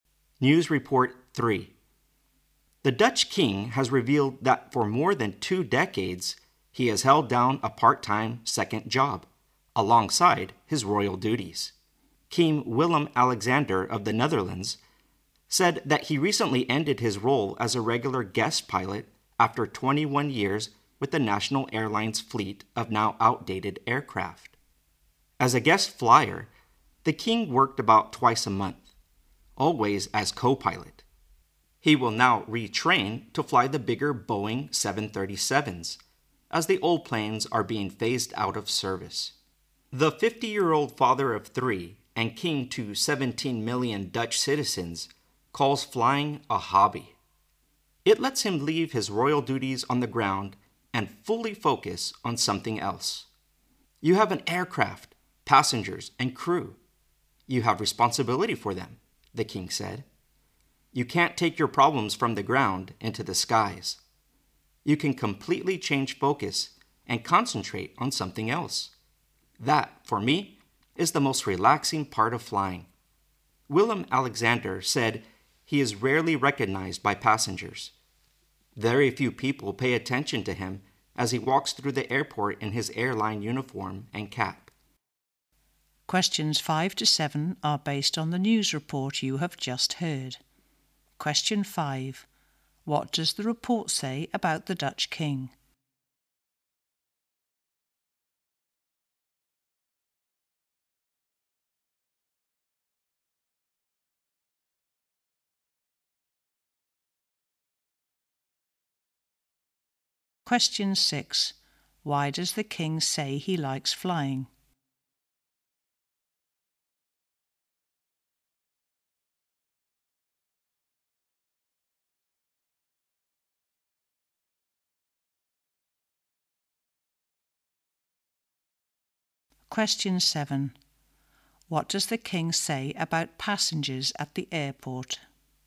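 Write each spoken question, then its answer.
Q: What does the report say about the Dutch king?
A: He secretly worked part-time as an airline co-pilot for 21 years.

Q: Why does the king say he likes flying?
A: It lets him forget his royal duties and focus fully on something else; it is relaxing.

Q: What does the king say about passengers at the airport?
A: They rarely recognize him.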